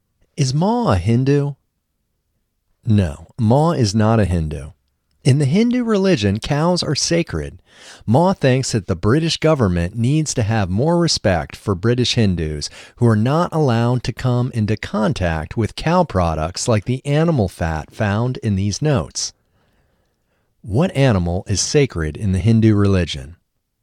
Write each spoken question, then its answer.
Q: What animal is sacred in the Hindu religion?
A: Cows are sacred in the Hindu religion.